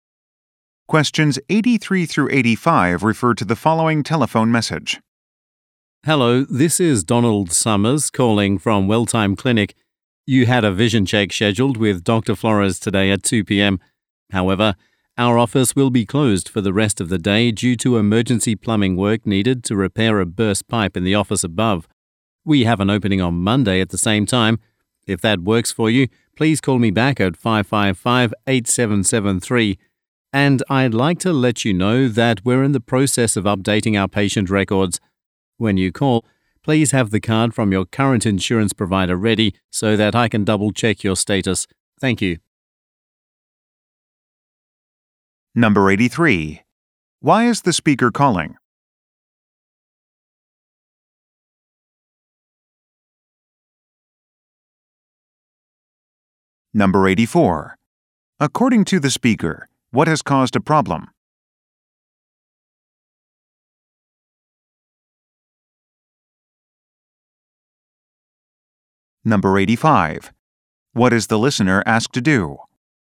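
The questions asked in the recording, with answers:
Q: Why is the speaker calling?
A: To reschedule a vision check appointment

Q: According to the speaker, what has caused a problem?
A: A burst pipe needing emergency plumbing work

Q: What is the listener asked to do?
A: Have their current insurance card ready when calling back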